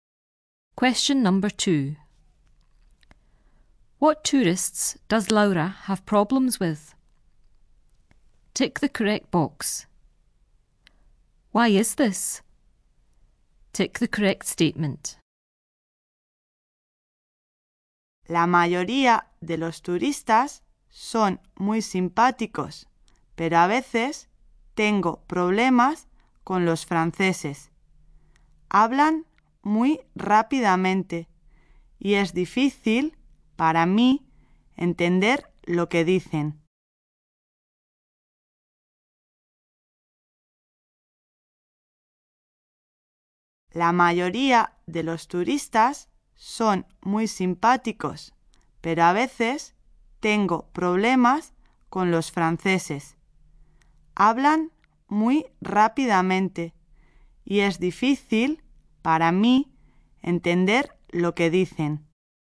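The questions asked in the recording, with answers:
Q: What tourists does Laura have problems with?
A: The French

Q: Why is this?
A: They speak very fast and she finds it hard to understand them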